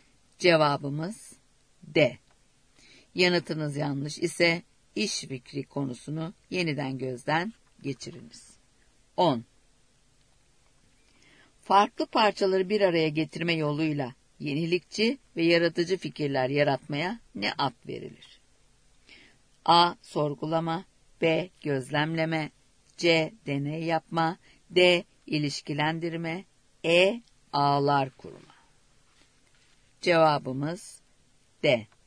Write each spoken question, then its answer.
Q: Farklı parçaları bir araya getirme yoluyla yenilikçi ve yaratıcı fikirler yaratmaya ne ad verilir?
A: Cevabımız D.